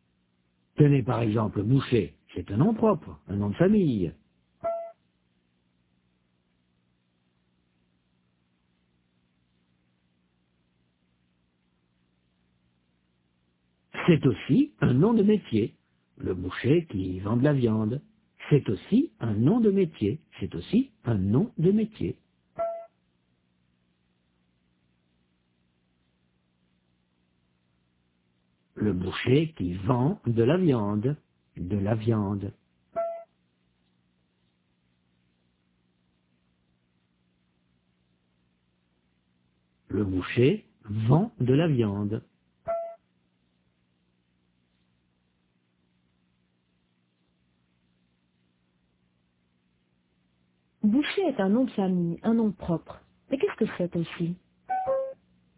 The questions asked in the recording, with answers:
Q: Mais qu'est-ce que c'est aussi?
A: Un nom de métier.